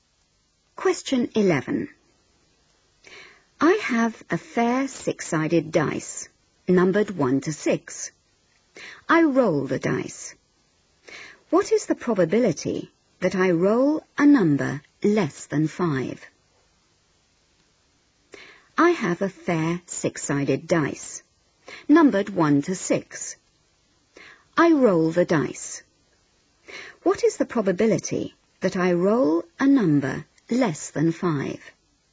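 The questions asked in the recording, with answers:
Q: What is the probability that I roll a number less than 5?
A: 4/6 (2/3)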